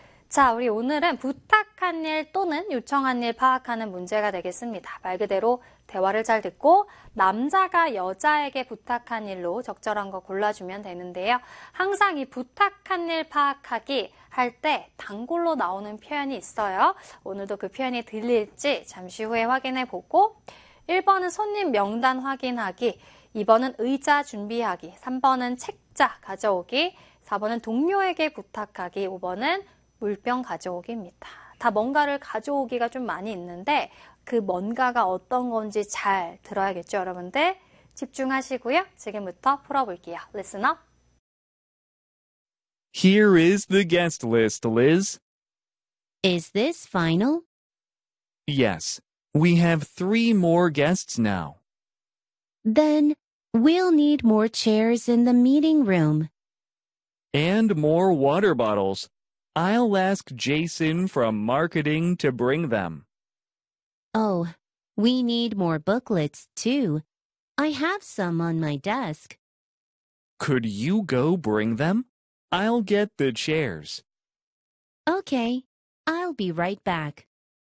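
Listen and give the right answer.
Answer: 3: 책자 가져오기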